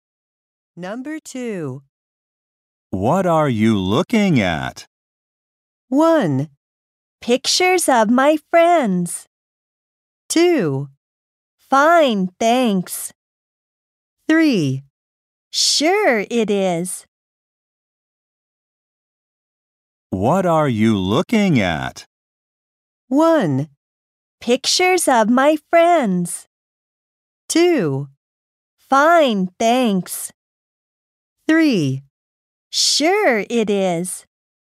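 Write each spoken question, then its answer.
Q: What are you looking at?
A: 1: Pictures of my friends.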